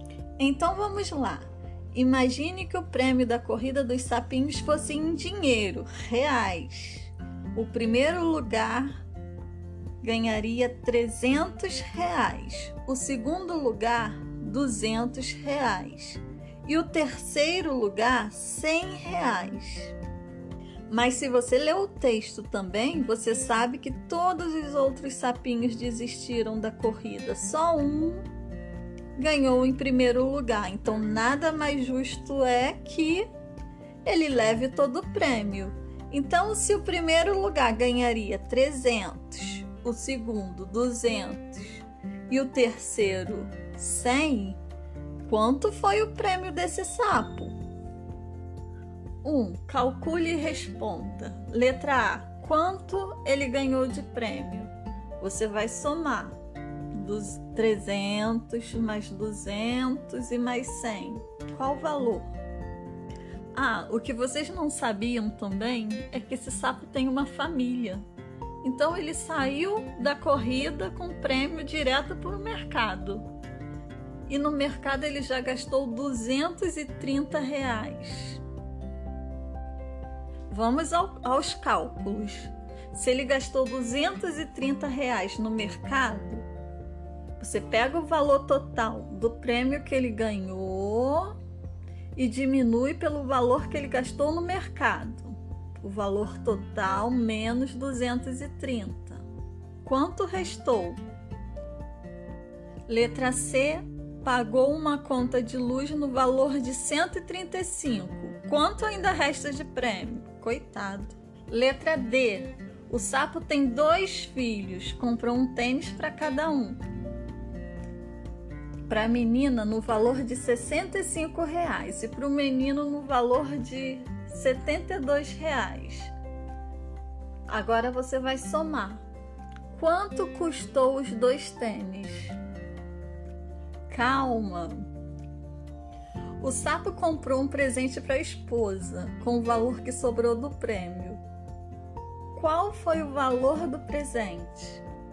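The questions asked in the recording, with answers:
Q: Quanto ele ganhou de prêmio?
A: R$ 600,00

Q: O valor total menos 230. Quanto restou?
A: R$ 370,00

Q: Quanto ainda resta de prêmio?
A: R$ 235,00

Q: Quanto custou os dois tênis?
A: R$ 137,00

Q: Qual foi o valor do presente?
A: R$ 98,00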